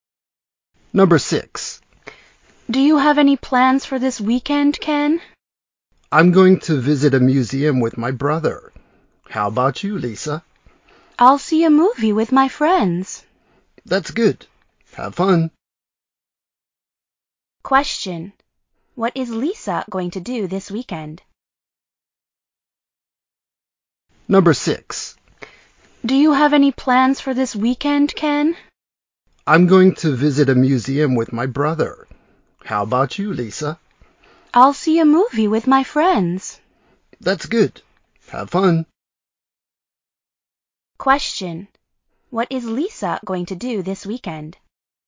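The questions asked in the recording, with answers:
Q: What is Lisa going to do this weekend?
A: See a movie with her friends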